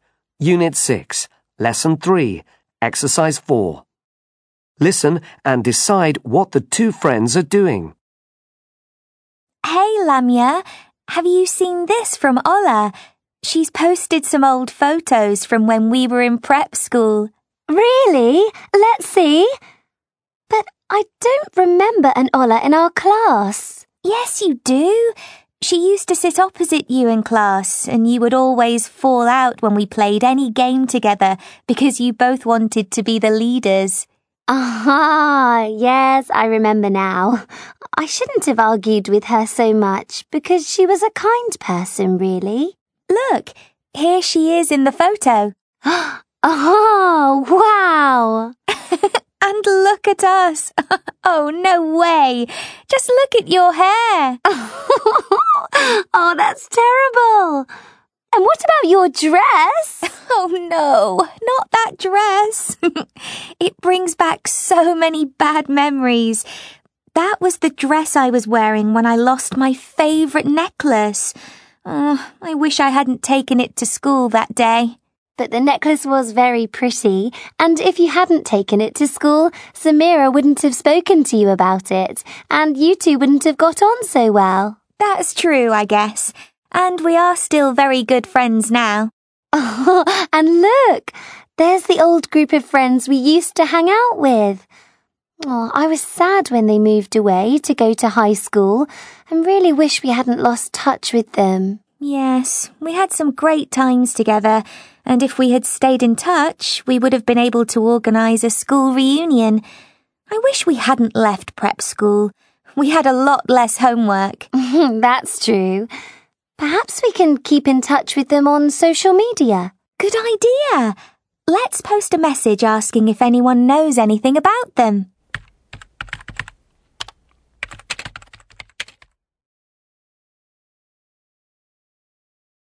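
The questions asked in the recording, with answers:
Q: Listen and decide what the two friends are doing.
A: Looking at old school photos that Ola posted online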